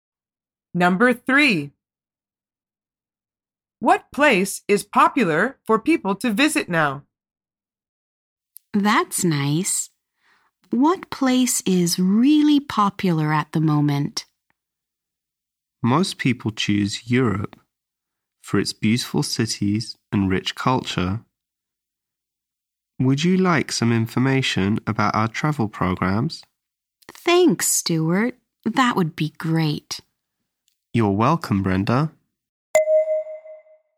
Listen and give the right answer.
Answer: The answer is Europe. The man says, most people choose Europe for its beautiful cities and rich culture.